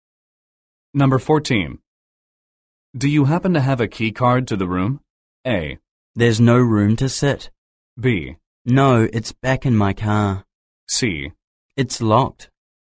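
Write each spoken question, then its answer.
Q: Do you happen to have a key card to the room?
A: B: No, it's back in my car.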